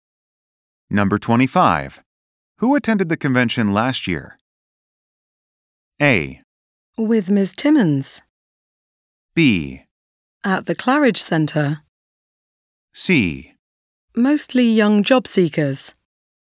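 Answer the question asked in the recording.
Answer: C: Mostly young job seekers.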